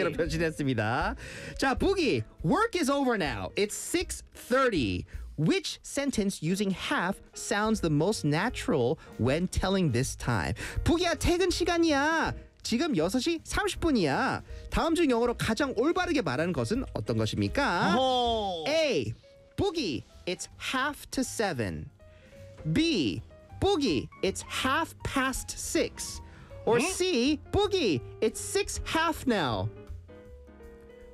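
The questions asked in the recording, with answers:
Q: It's 6:30. Which sentence using half sounds the most natural when telling this time?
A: B: Boogie, it's half past six.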